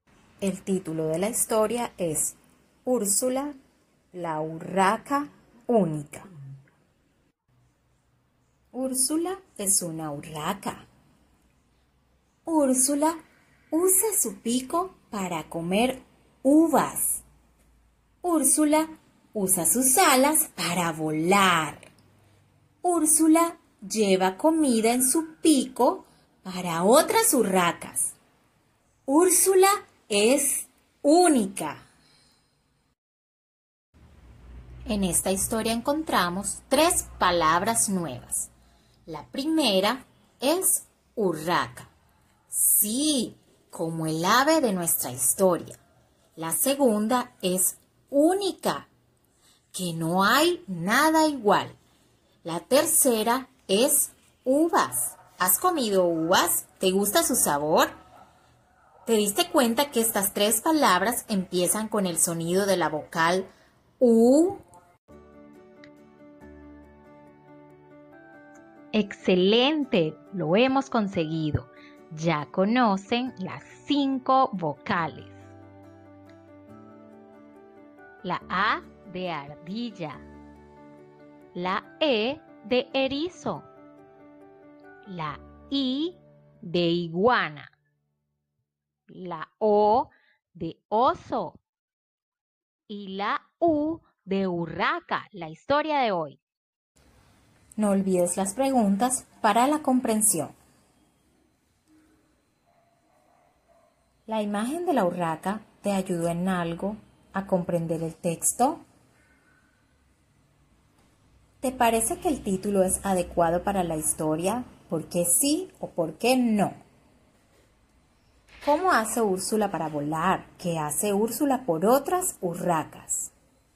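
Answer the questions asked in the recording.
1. Usa sus alas
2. Lleva comida en su pico para otras urracas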